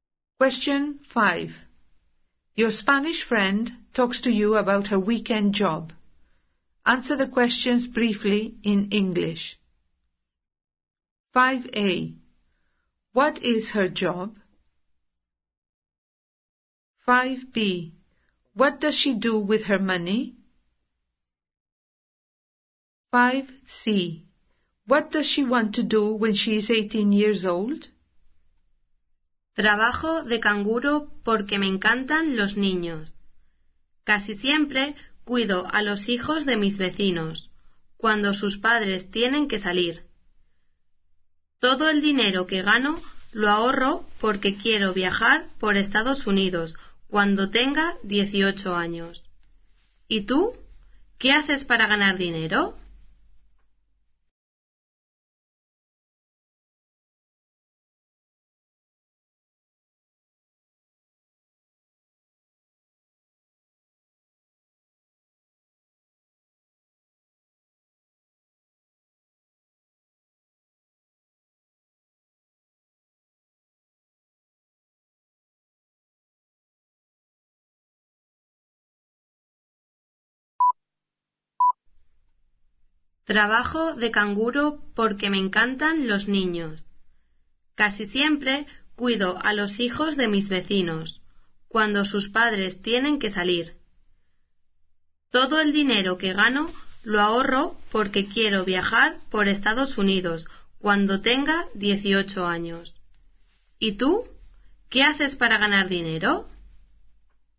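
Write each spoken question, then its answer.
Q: What is her job?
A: Babysitter

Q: What does she do with her money?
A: She saves it all

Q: What does she want to do when she is 18 years old?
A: Travel around the United States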